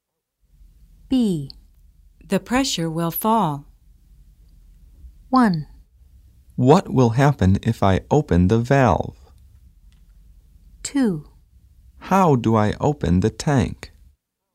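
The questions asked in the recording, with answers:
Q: The pressure will fall.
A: 1: What will happen if I open the valve?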